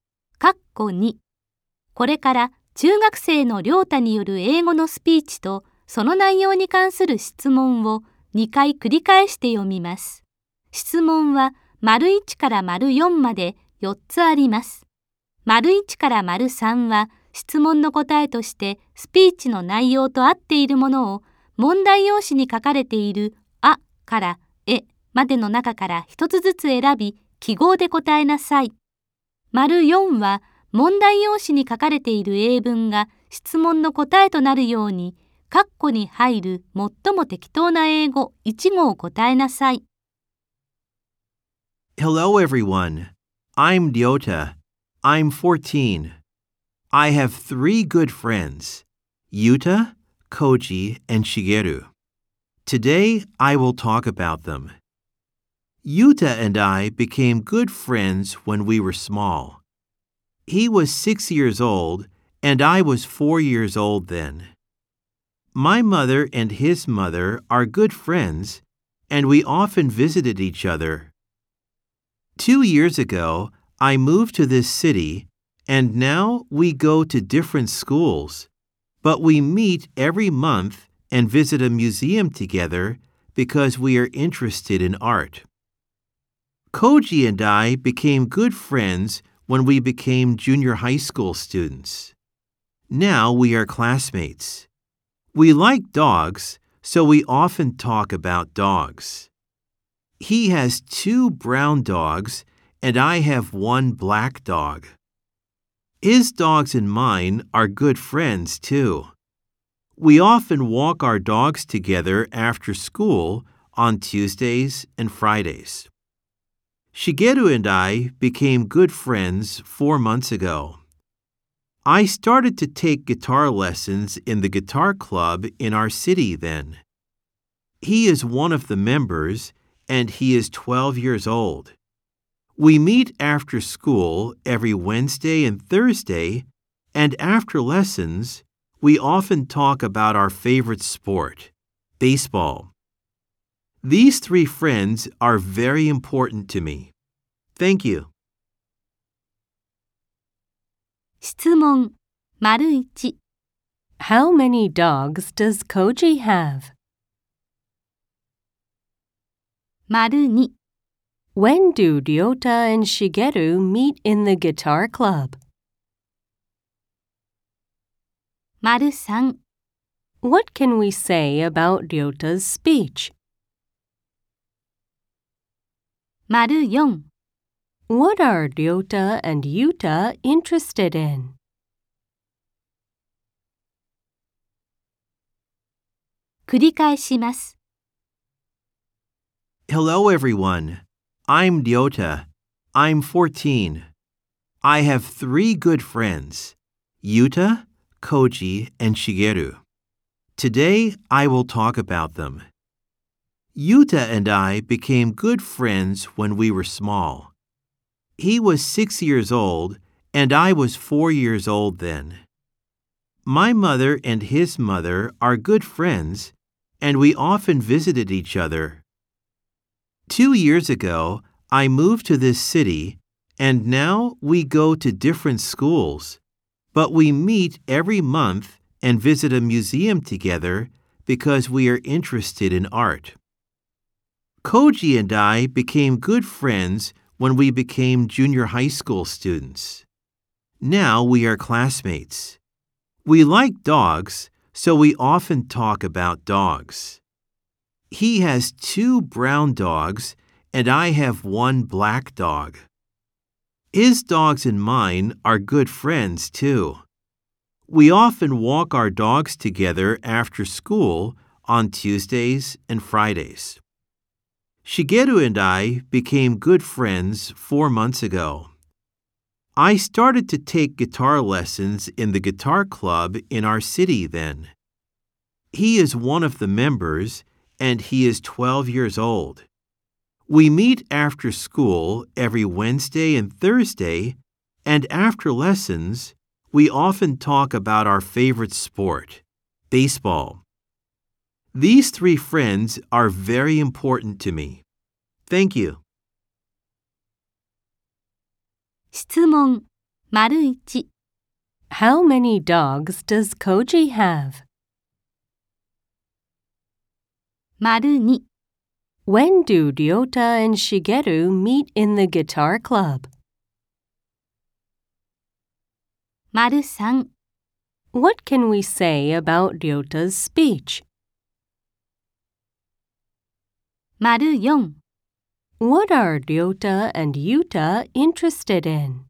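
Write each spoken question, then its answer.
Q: How many dogs does Koji have?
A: Two

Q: When do Ryota and Shigeru meet in the guitar club?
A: After school every Wednesday and Thursday

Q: What are Ryota and Yuta interested in?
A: Art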